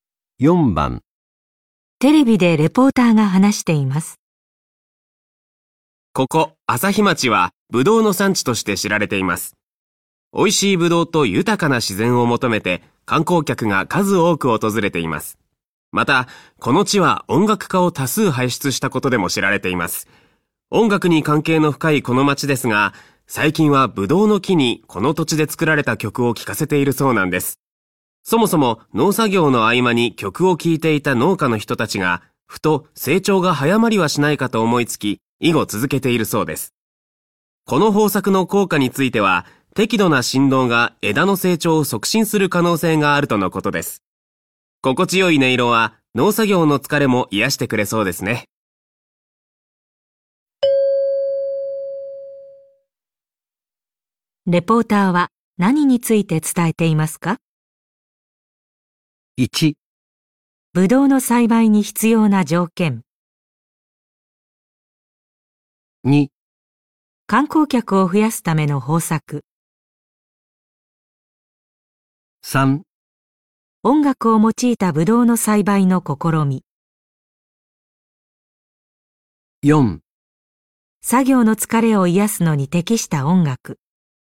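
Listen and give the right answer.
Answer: 3: 音楽を用いたブドウの栽培の試み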